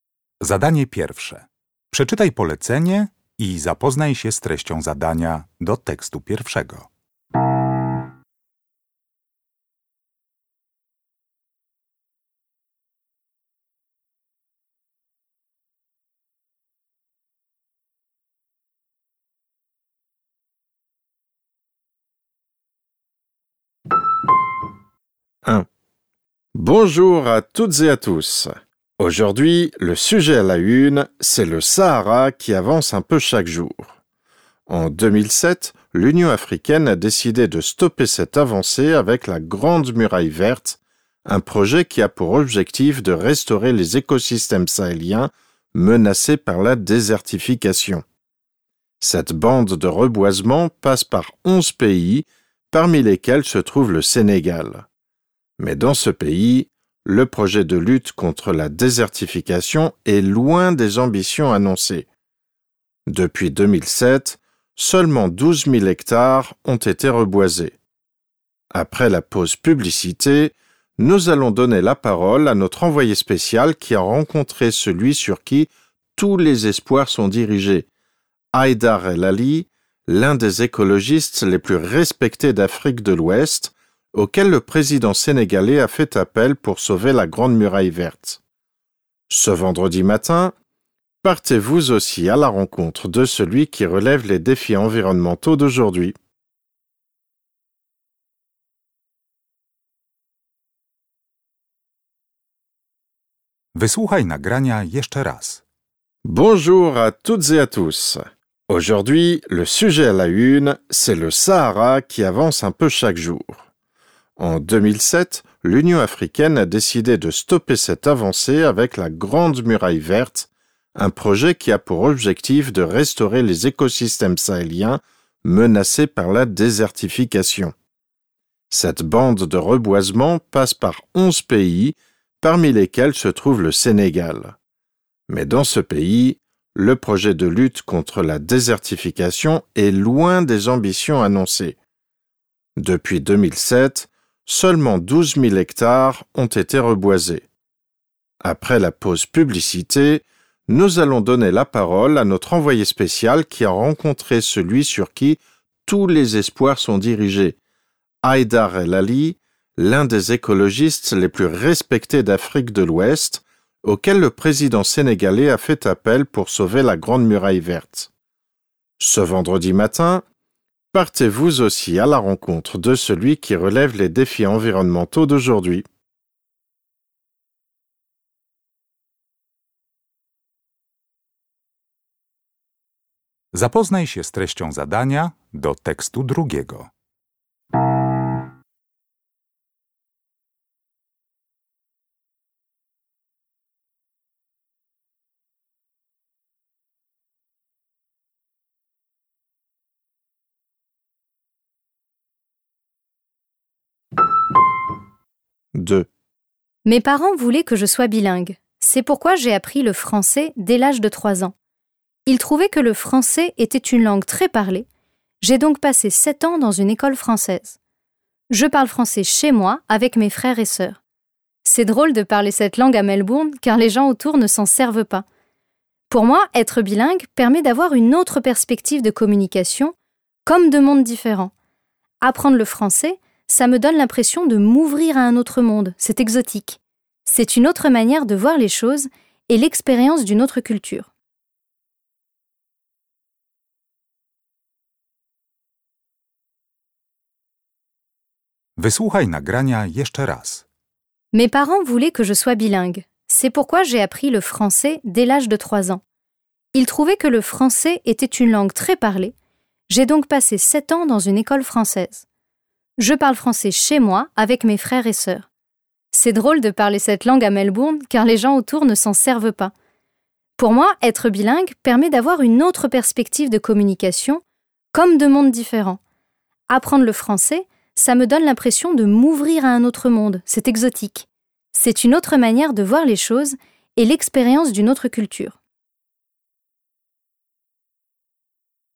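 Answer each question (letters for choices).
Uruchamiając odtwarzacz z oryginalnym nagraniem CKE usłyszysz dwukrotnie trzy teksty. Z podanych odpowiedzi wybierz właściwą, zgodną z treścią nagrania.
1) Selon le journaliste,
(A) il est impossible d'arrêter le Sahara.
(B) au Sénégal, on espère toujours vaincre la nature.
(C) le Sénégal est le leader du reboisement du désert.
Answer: B

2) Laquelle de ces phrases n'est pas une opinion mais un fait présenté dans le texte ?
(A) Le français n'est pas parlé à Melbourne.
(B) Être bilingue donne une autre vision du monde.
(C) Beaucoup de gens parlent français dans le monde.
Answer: A

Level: Poziom: rozszerzony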